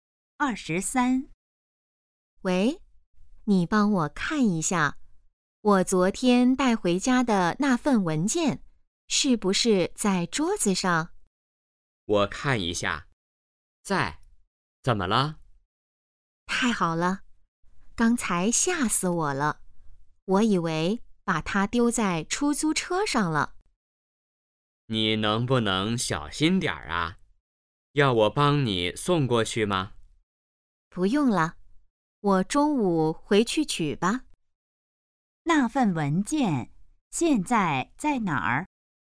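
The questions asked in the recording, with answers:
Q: 那份文件现在在哪儿?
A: 在家里桌子上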